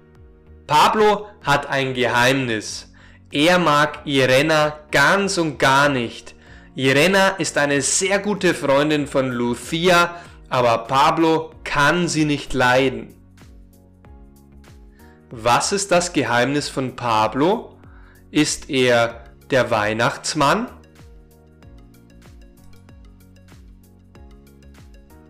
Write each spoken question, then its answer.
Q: Was ist das Geheimnis von Pablo?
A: Sein Geheimnis ist, dass er Irena ganz und gar nicht mag.